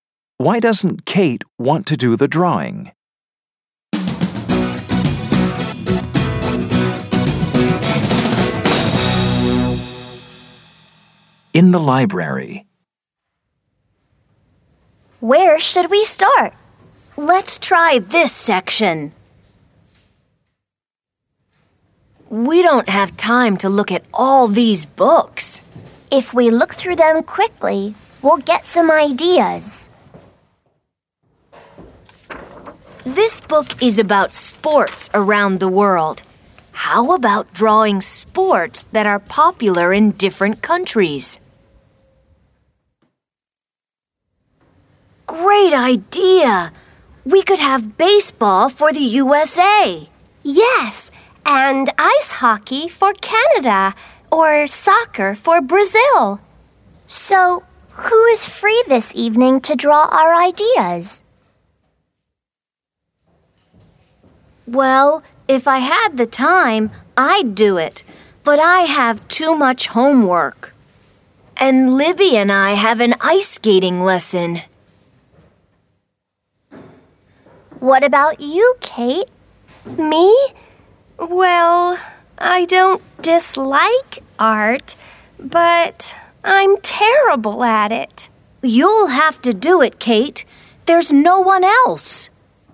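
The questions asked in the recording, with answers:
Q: Why doesn't Kate want to do the drawing?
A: Because she's terrible at art.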